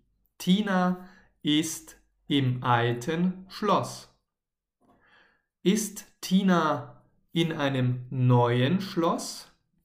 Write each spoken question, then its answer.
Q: Ist Tina in einem neuen Schloss?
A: Nein, sie ist nicht in einem neuen Schloss.